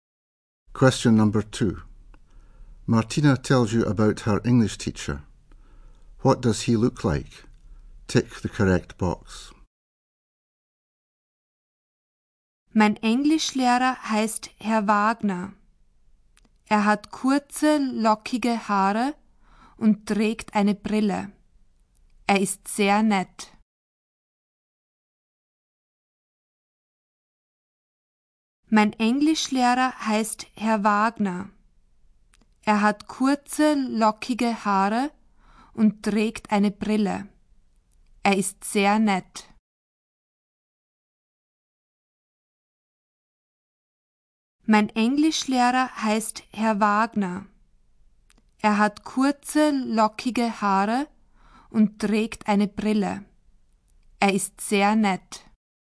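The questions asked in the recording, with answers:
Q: What does he look like?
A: Short curly hair and glasses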